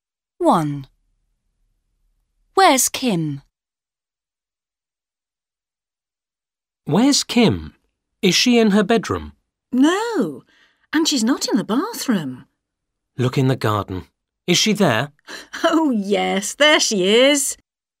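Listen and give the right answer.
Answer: In the garden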